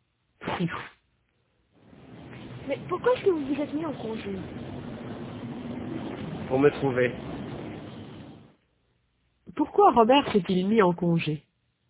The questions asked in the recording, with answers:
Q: Pourquoi Robert s'est-il mis en congé?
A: Pour se trouver.